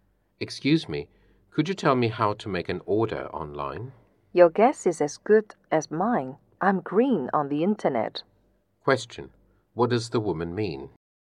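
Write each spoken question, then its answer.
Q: What does the woman mean?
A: She doesn't know how; she is new to the internet.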